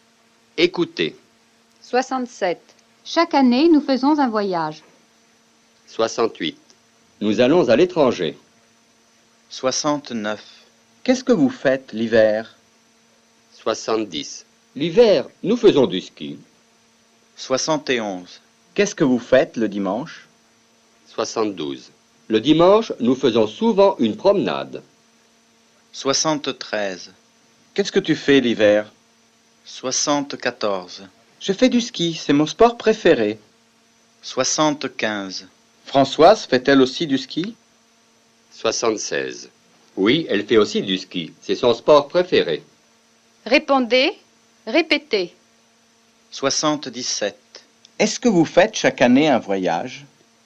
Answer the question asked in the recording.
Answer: Oui, chaque année nous faisons un voyage.